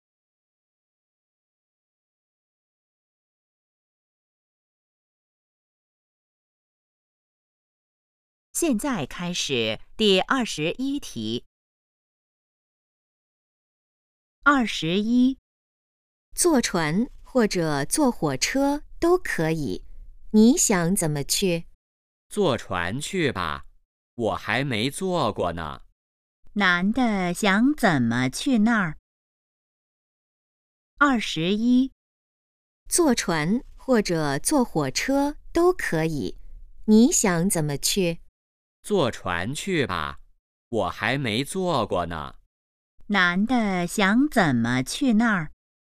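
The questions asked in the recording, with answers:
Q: 男的想怎么去那儿?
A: 坐船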